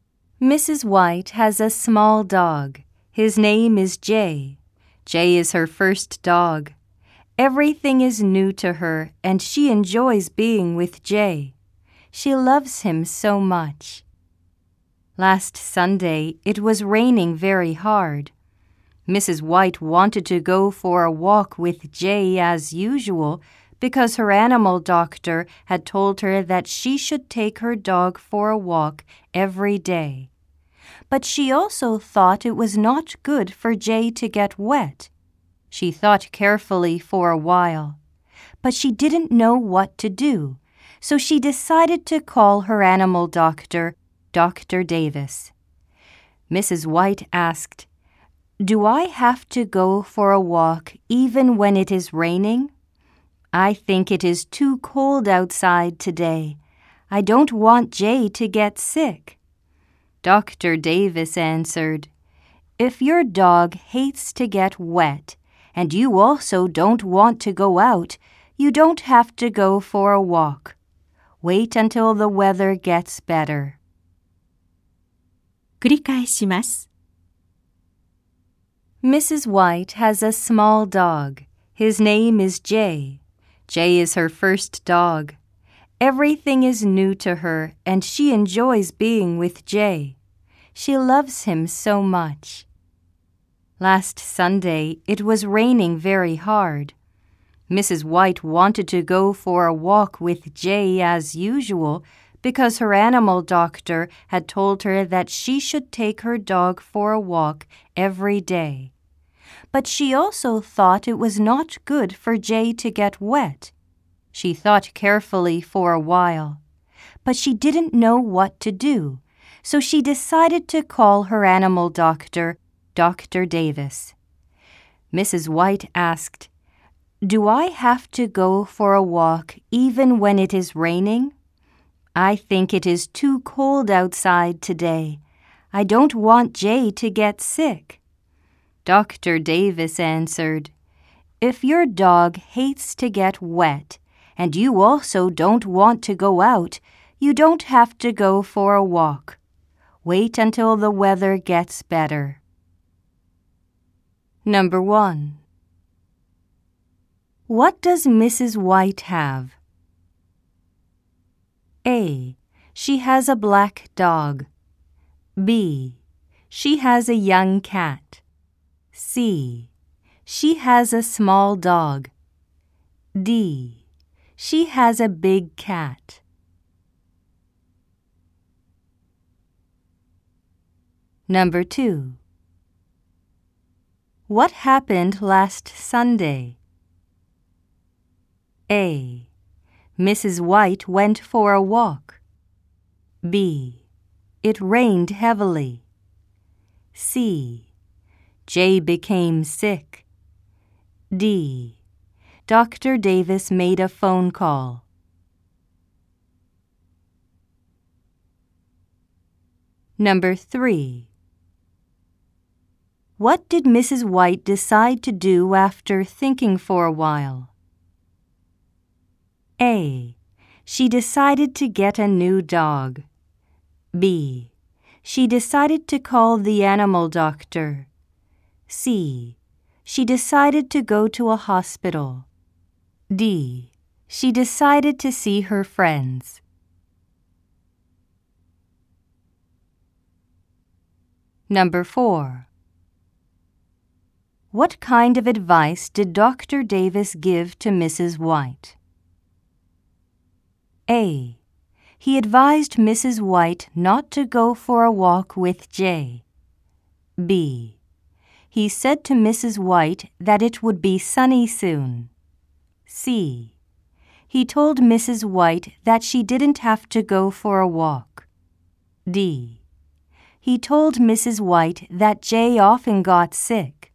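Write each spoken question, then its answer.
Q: What does Mrs. White have?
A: C: She has a small dog.

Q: What happened last Sunday?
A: B: It rained heavily.

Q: What did Mrs. White decide to do after thinking for a while?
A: B: She decided to call the animal doctor.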